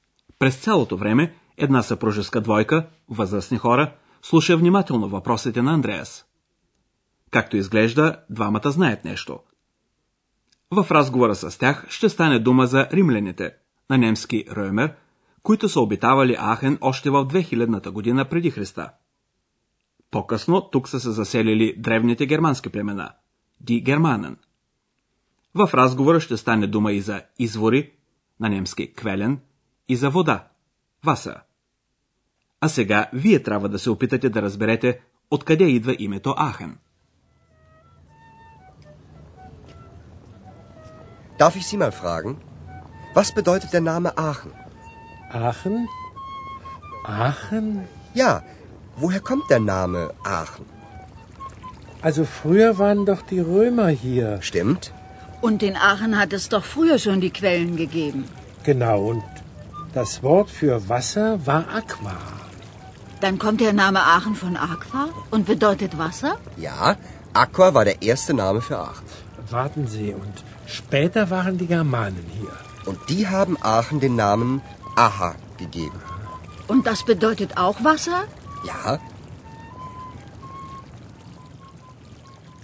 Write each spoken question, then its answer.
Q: А сега вие трябва да се опитате да разберете откъде идва името Ахен.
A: вие сигурно разбрахте, че името Ахен означава вода, защото тук има много извори.